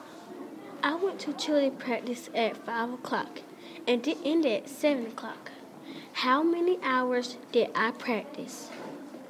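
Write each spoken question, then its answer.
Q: How many hours did I practice?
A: 2 hours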